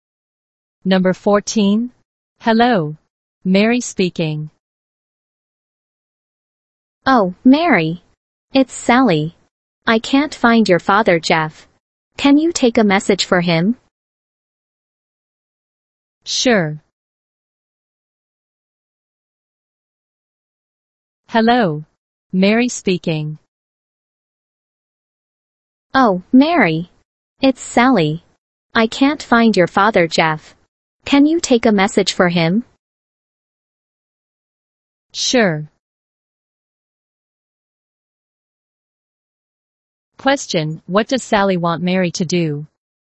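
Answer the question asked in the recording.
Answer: Take a message for her father, Jeff.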